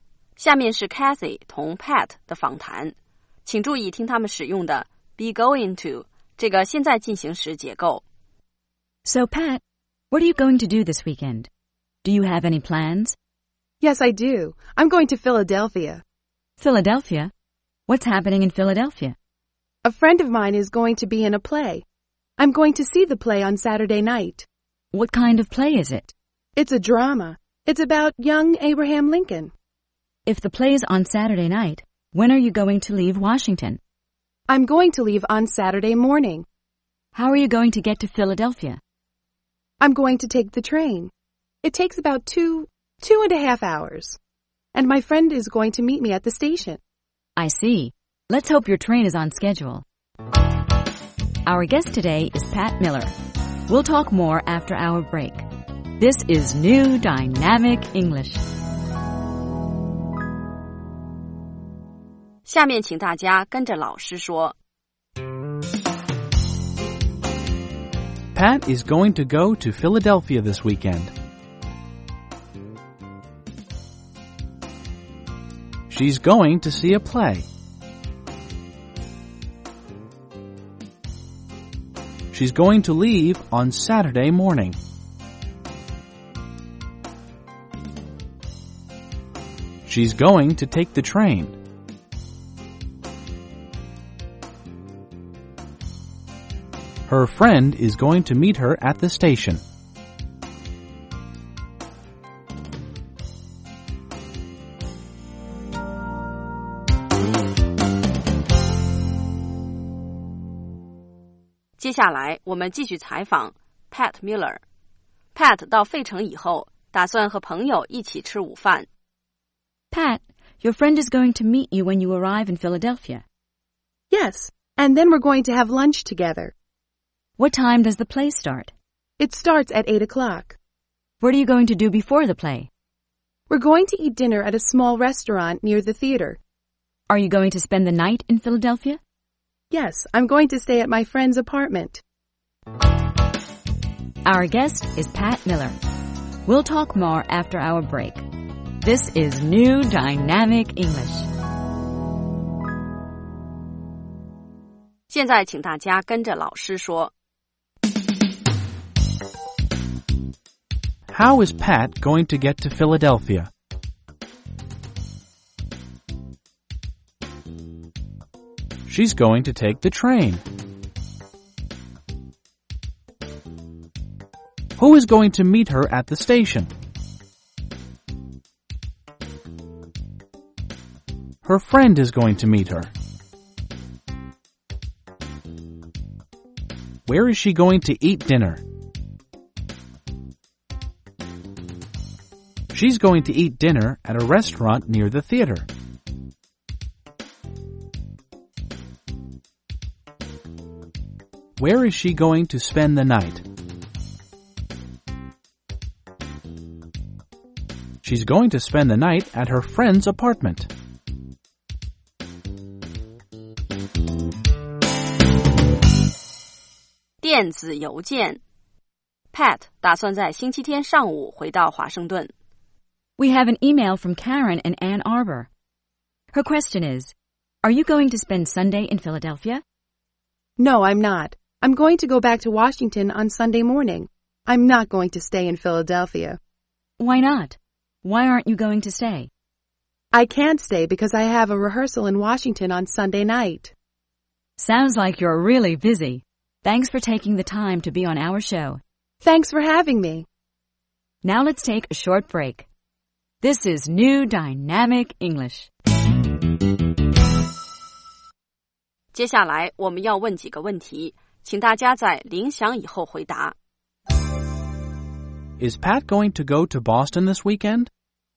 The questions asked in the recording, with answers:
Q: Is Pat going to go to Boston this weekend?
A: No, she isn't. She isn't going to go to Boston.